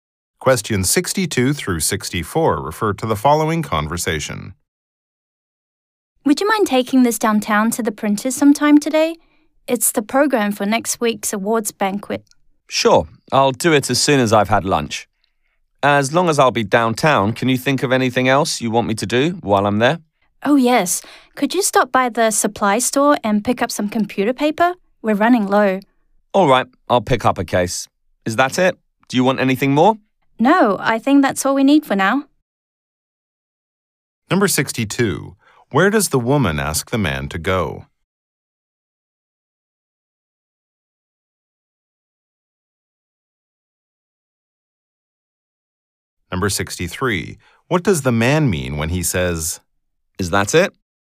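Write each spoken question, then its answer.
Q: Where does the woman ask the man to go?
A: To the printers downtown

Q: What does the man mean when he says, Is that it?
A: He is asking if she needs anything else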